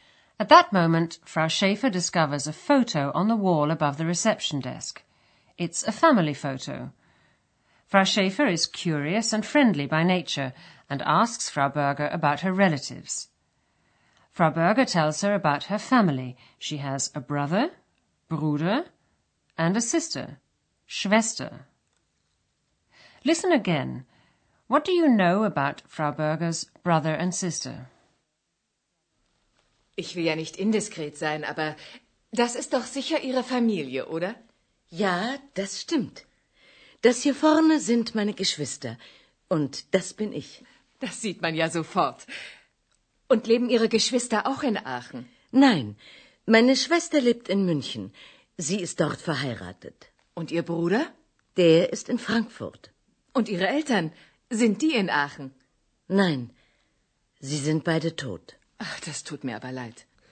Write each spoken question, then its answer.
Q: What do you know about Frau Berger's brother and sister?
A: Frau Berger's sister is married and lives in Munich.